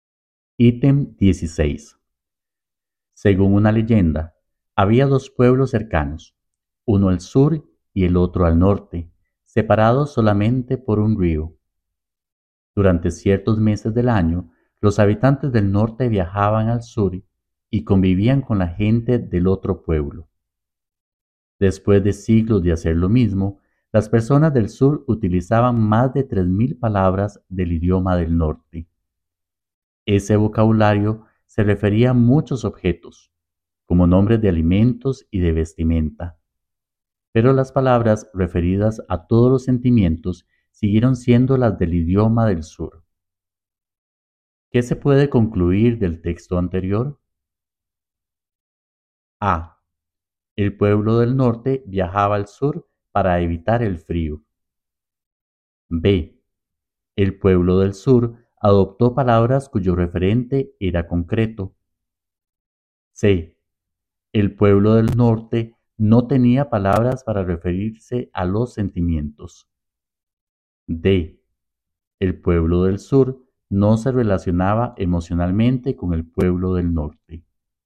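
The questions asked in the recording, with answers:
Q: ¿Qué se puede concluir del texto anterior?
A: B: El pueblo del sur adoptó palabras cuyo referente era concreto.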